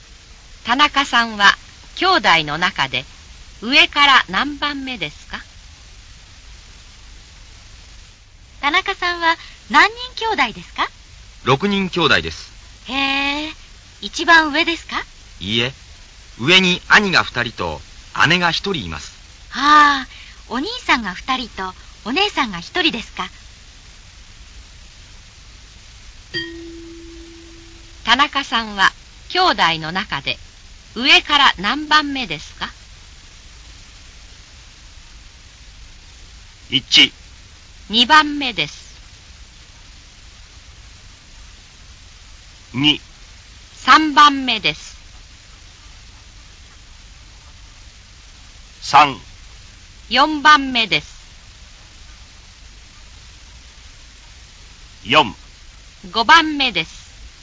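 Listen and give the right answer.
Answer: 3: 四番目です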